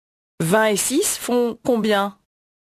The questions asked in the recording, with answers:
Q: 20 et 6 font combien?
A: 26.